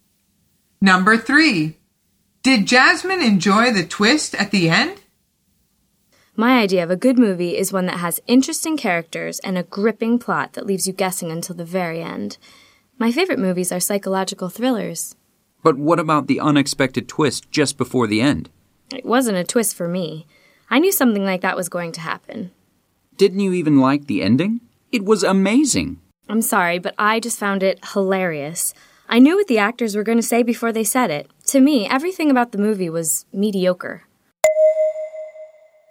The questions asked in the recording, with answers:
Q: Did Jasmine enjoy the twist at the end?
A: The answer is no.